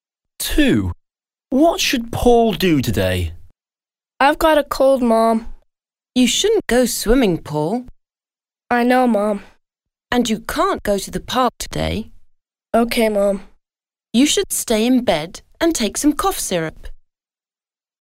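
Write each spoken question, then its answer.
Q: What should Paul do today?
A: Stay in bed and take some cough syrup.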